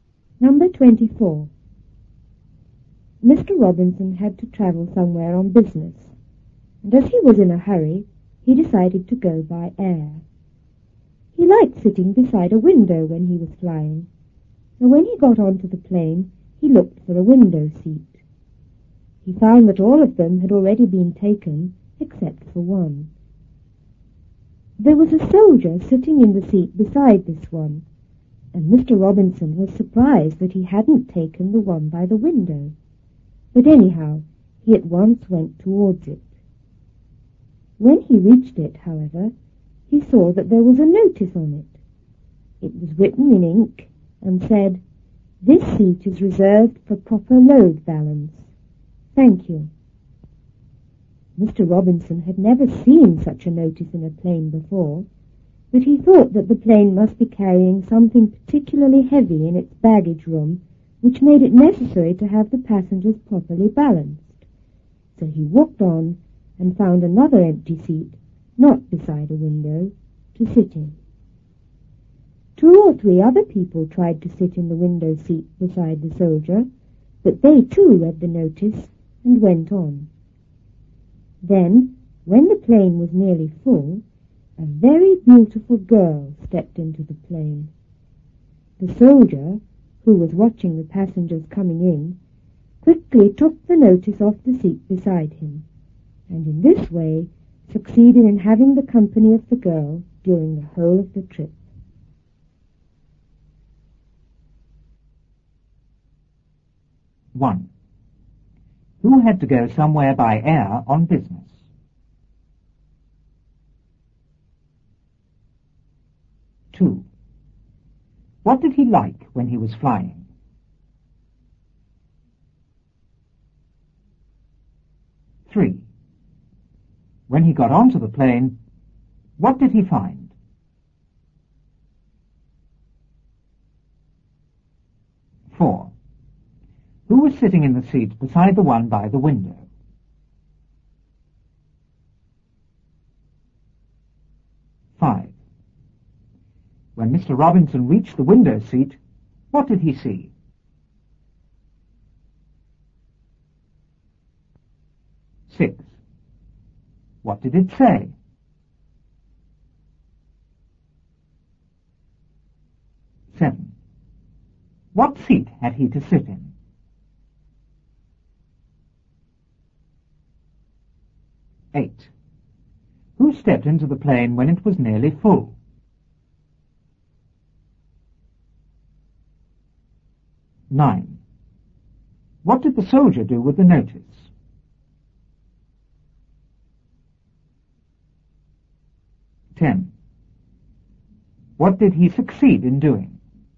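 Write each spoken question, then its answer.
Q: Who had to go somewhere by air on business?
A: Mr. Robinson

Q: What did he like when he was flying?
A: Sitting beside a window

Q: When he got onto the plane, what did he find?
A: All the window seats had been taken except for one

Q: Who was sitting in the seat beside the one by the window?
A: A soldier

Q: When Mr. Robinson reached the window seat, what did he see?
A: A notice on it

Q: What did it say?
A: This seat is reserved for proper load balance. Thank you.

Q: What seat had he to sit in?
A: Another empty seat, not beside a window

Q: Who stepped into the plane when it was nearly full?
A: A very beautiful girl

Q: What did the soldier do with the notice?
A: He quickly took it off the seat beside him

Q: What did he succeed in doing?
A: Having the company of the girl during the whole trip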